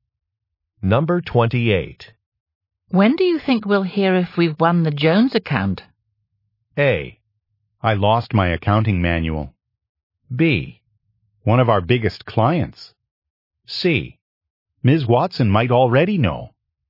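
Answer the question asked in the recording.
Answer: C: Ms. Watson might already know.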